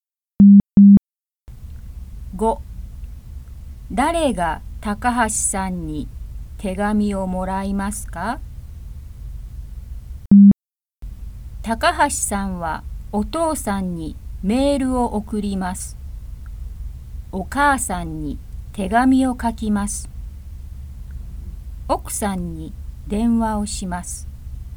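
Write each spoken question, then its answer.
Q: 誰が高橋さんに手紙をもらいますか?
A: お母さん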